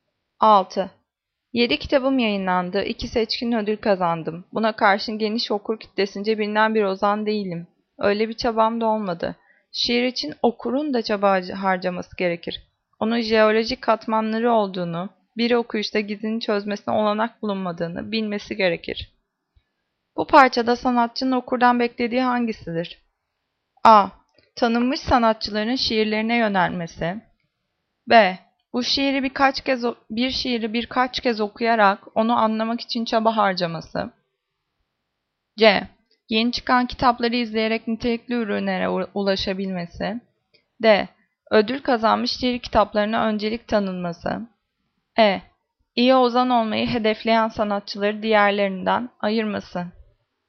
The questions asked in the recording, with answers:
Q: Bu parçada sanatçının okurdan beklediği hangisidir?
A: Cevap B. Bir şiiri birçok kez okuyarak onu anlamak için çaba harcaması.